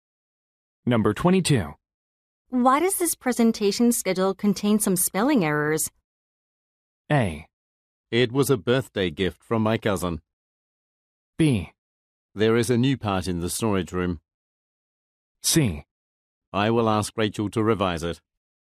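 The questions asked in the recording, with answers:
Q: Why does this presentation schedule contain some spelling errors?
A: C: I will ask Rachel to revise it.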